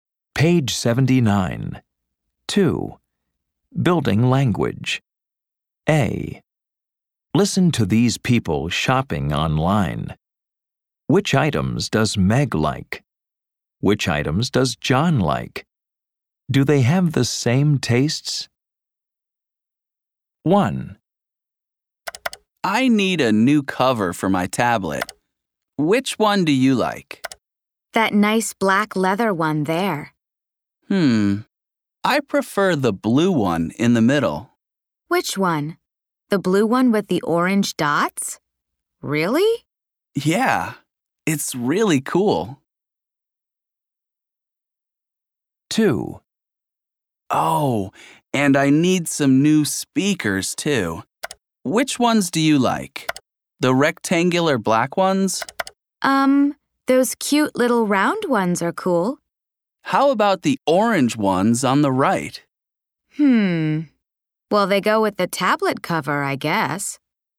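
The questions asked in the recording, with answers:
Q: Do they have the same tastes?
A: No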